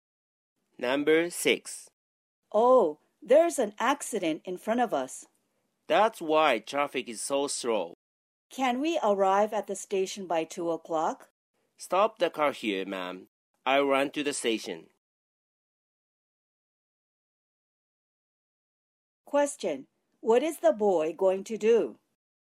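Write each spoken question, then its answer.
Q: What is the boy going to do?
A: run to the station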